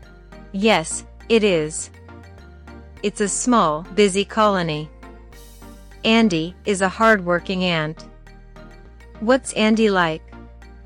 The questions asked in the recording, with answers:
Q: What's Andy like?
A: He's a hard-working ant.